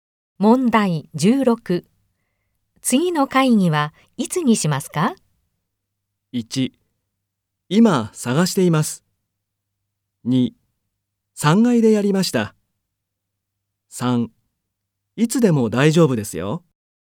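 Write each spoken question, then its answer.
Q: 次の会議はいつにしますか?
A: 1: いつでも大丈夫ですよ。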